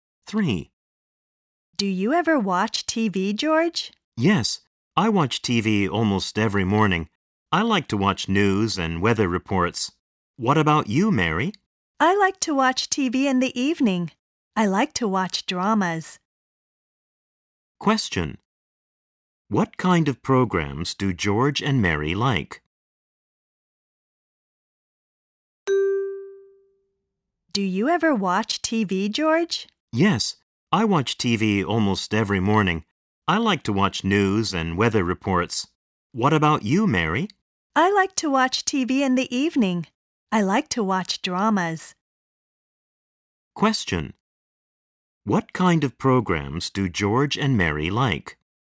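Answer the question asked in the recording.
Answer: George likes news and weather reports; Mary likes dramas.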